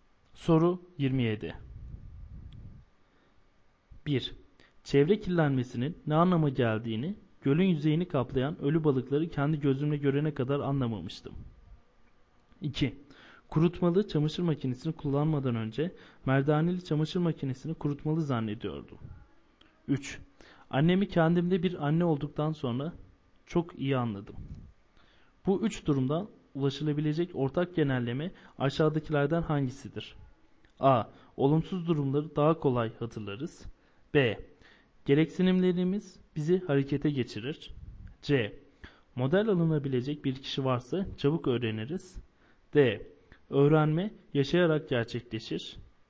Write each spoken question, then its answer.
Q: Bu üç durumdan ulaşılabilecek ortak genelleme aşağıdakilerden hangisidir?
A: Doğru yanıt B şıkkı.